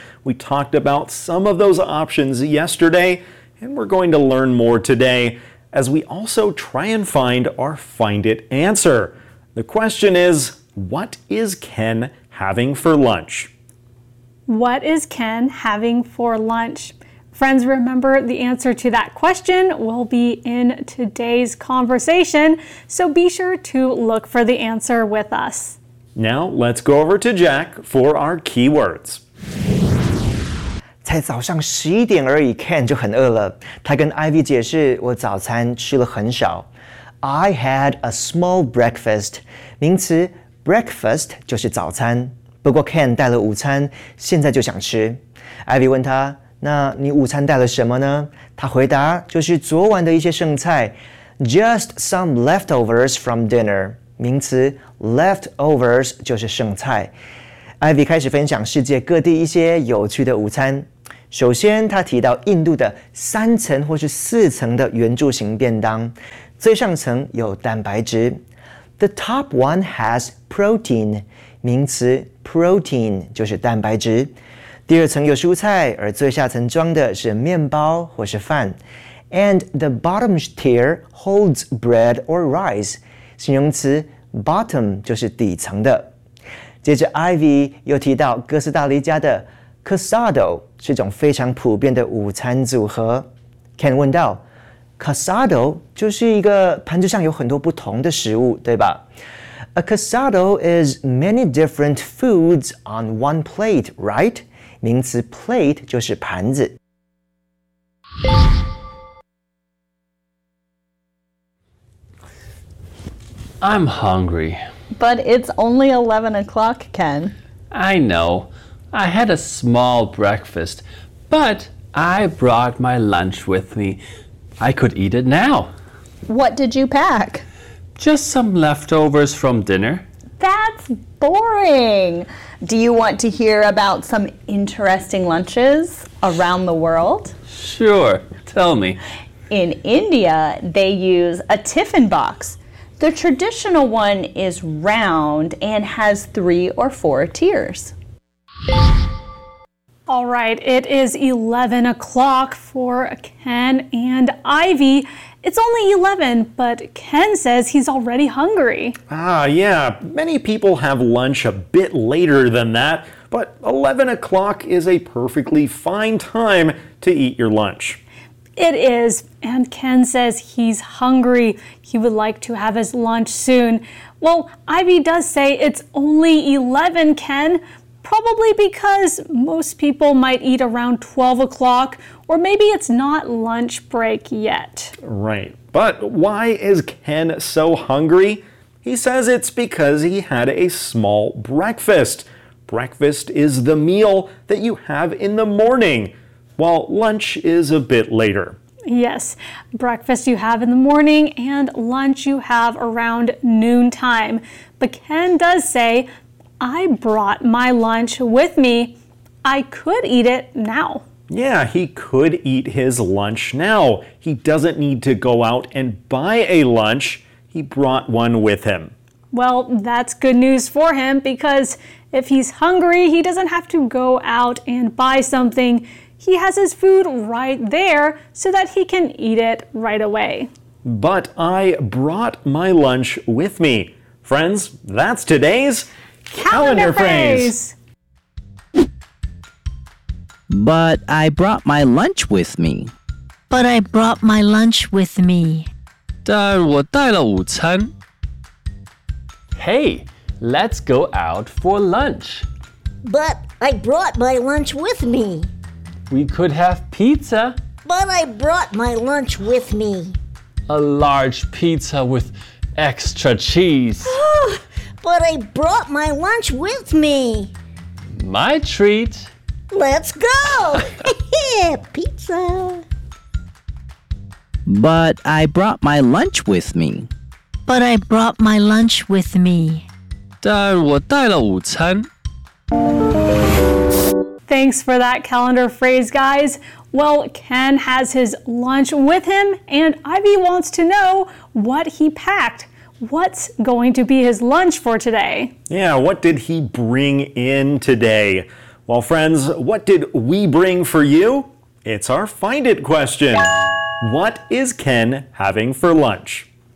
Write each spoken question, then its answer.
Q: What is Ken having for lunch?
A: And the answer is leftovers from dinner.